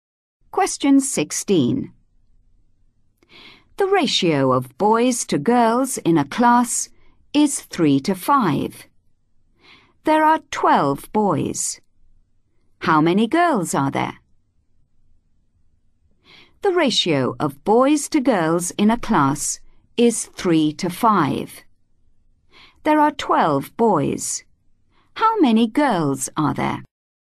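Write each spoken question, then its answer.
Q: There are 12 boys. How many girls are there?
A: 20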